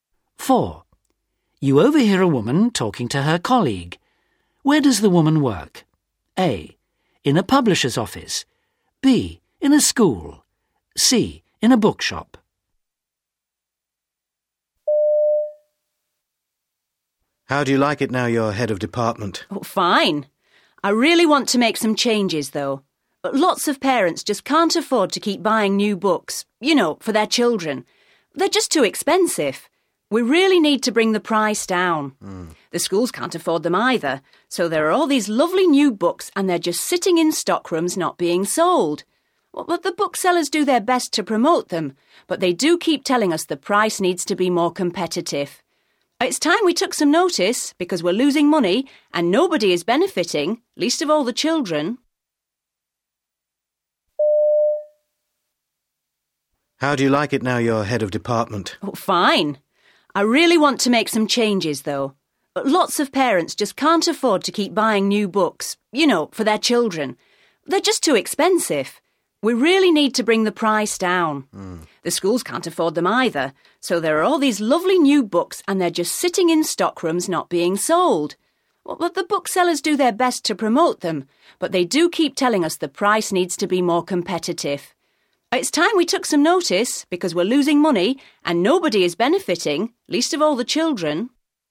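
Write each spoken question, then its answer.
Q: Where does the woman work?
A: A: In a publisher's office.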